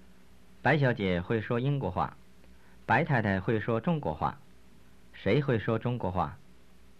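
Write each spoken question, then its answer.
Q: 谁会说中国话?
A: 白太太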